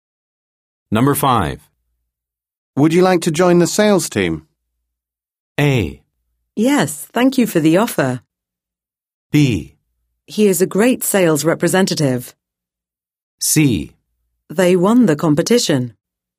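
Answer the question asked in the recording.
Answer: A: Yes, thank you for the offer.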